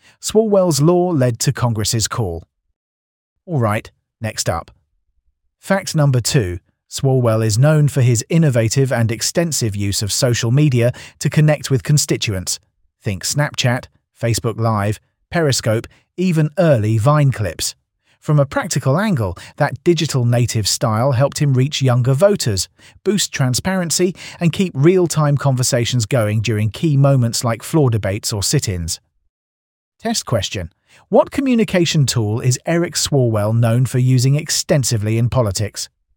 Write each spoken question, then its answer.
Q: What communication tool is Eric Swalwell known for using extensively in politics?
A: Social media.